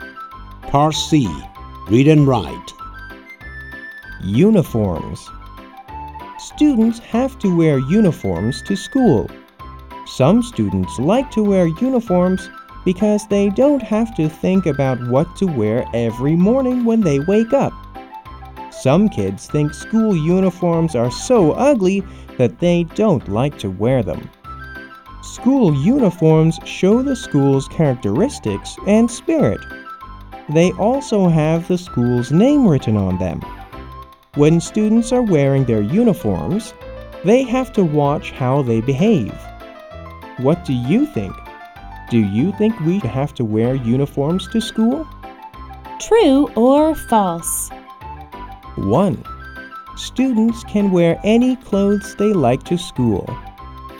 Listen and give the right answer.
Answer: False. Students have to wear uniforms to school.